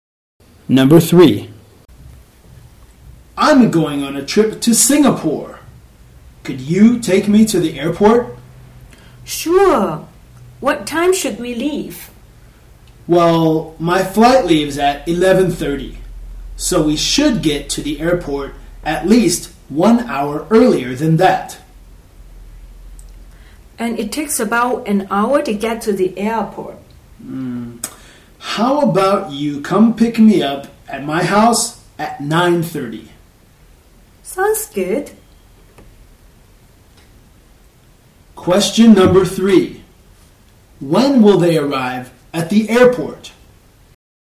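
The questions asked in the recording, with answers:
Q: When will they arrive at the airport?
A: At 10:30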